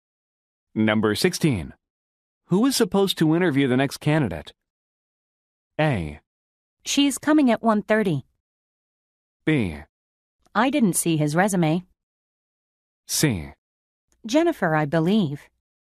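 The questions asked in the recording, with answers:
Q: Who is supposed to interview the next candidate?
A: C: Jennifer, I believe.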